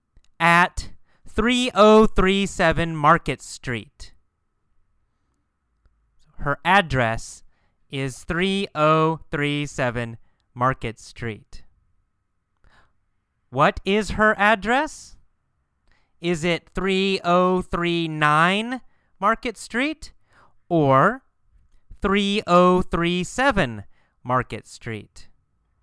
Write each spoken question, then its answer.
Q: What is her address? Is it 3039 Market Street or 3037 Market Street?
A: Yes. She lives at 3037 Market Street.